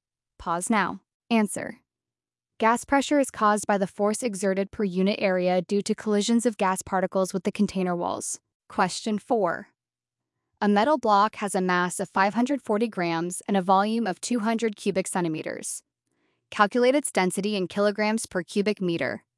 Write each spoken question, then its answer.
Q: a metal block has a mass of 540 grams and a volume of 200 cubic centimeters. Calculate its density in kilograms per cubic meter.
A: Density equals 0.54 divided by 0.0002 equals 2,700 kilograms per cubic meter.